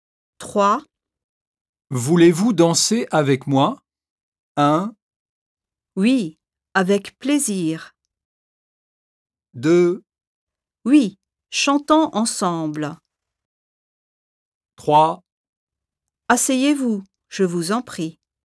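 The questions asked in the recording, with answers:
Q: Voulez-vous danser avec moi?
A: 2: Oui. Avec plaisir.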